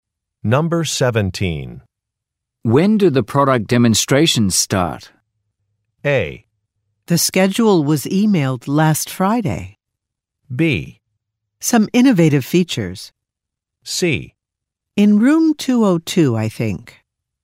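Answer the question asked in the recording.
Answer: A: The schedule was emailed last Friday.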